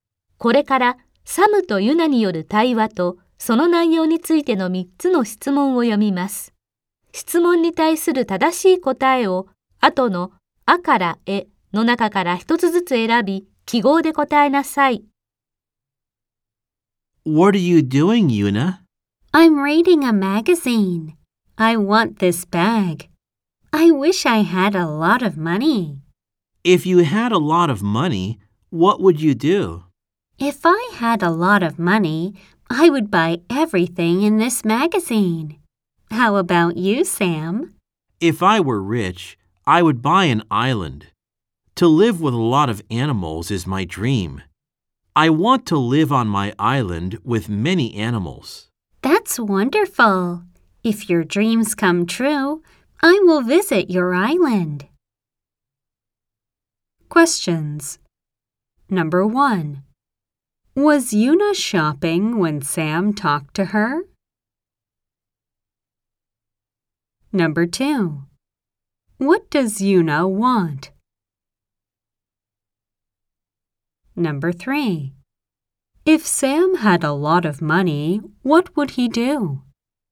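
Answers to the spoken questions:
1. No, she wasn't. She was reading a magazine.
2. A bag (in the magazine).
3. He would buy an island.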